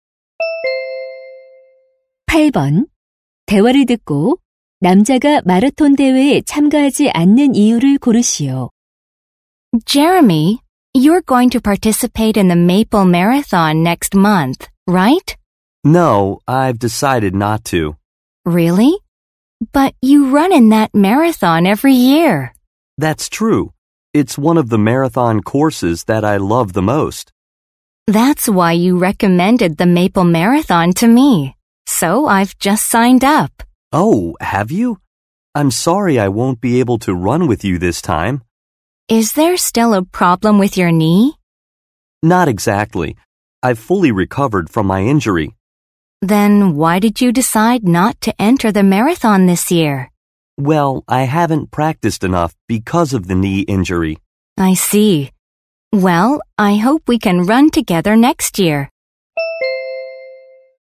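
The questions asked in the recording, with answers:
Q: 대화를 듣고 남자가 마라톤 대회에 참가하지 않는 이유를 고르시오.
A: 무릎 부상 때문에 연습을 충분히 하지 못해서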